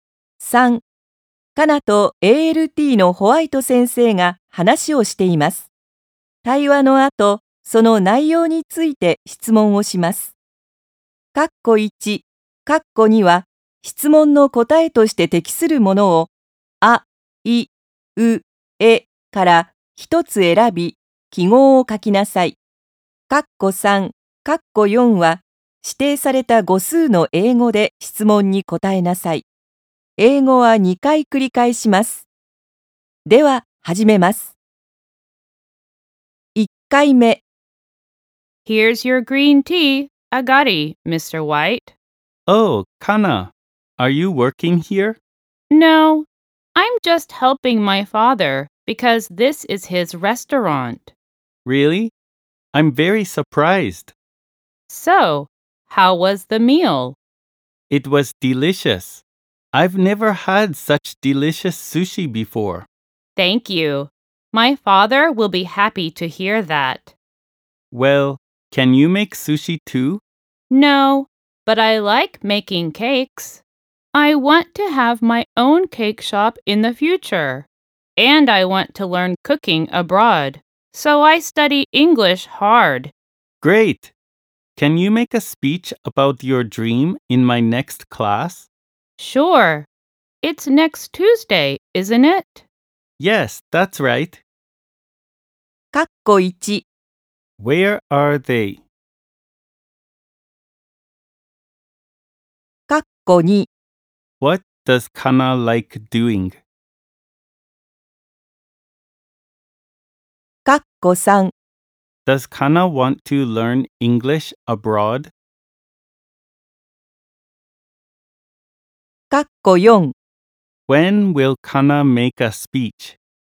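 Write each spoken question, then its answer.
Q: Where are they?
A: At Kana's father's restaurant.

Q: What does Kana like doing?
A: Making cakes.

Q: Does Kana want to learn English abroad?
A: No, she doesn't.

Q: When will Kana make a speech?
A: Next Tuesday.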